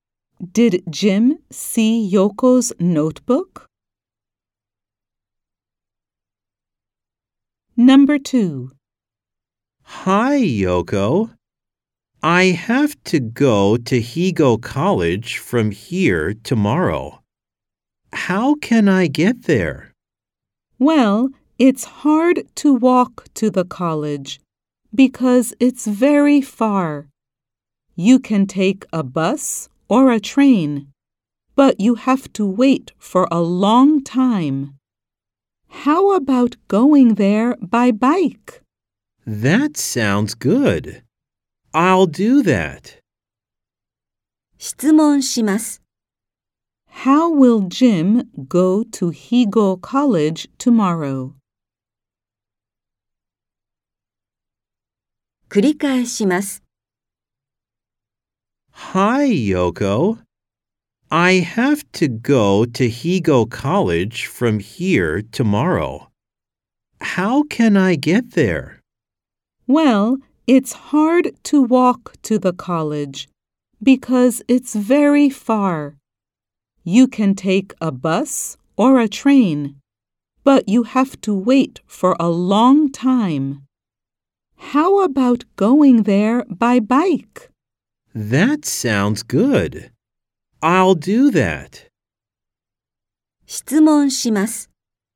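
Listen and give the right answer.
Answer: By bike.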